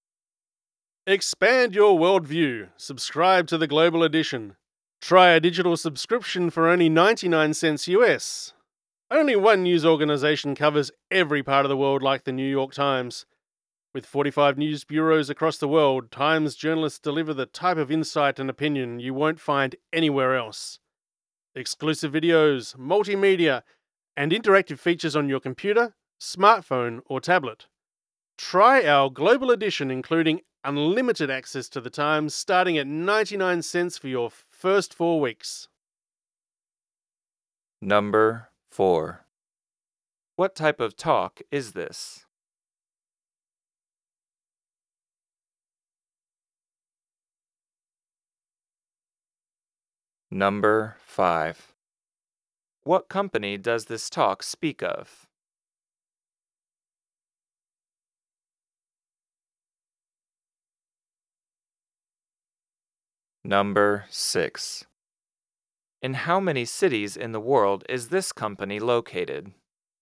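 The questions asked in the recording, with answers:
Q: What type of talk is this?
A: An advertisement

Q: What company does this talk speak of?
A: The New York Times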